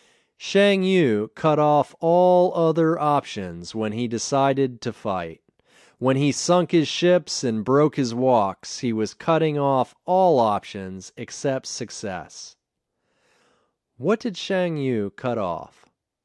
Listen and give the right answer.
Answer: He cut off all other options except success.